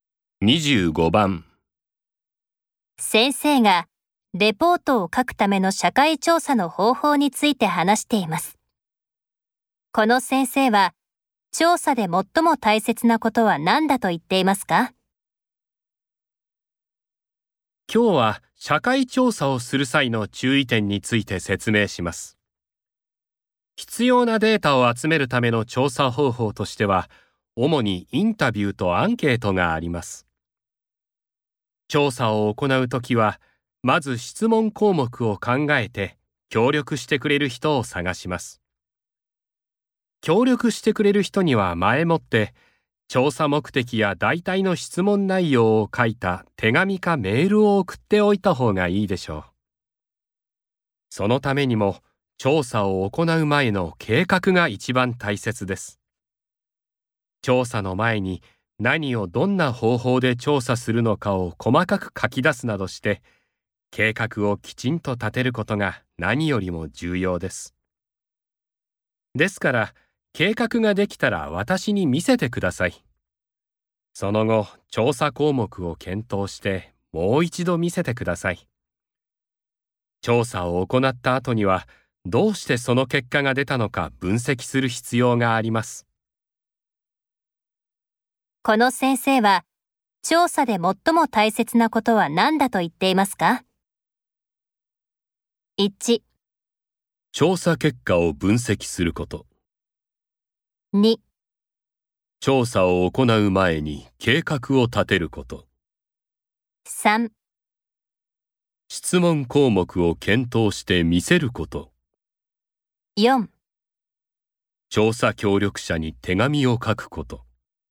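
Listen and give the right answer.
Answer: 2: 調査を行う前に計画を立てること。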